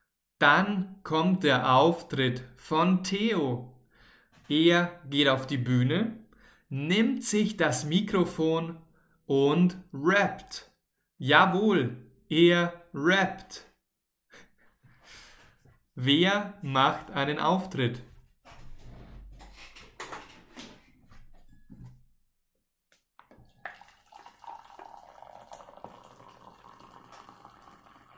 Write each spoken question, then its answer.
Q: Wer macht einen Auftritt?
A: Theo. Theo macht einen Auftritt.